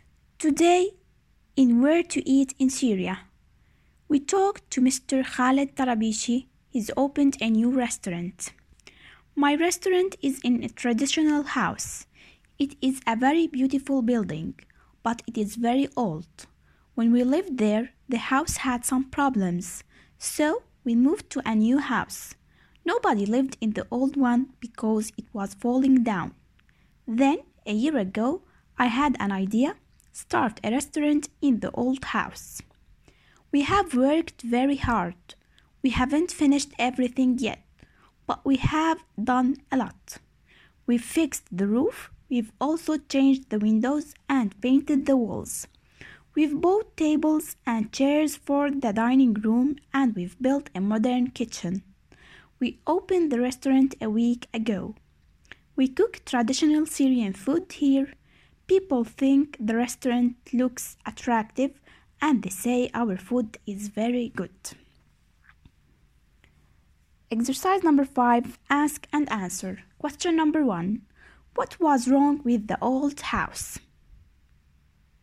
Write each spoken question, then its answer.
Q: What was wrong with the old house?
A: it is very old. It was falling down and nobody lived in it.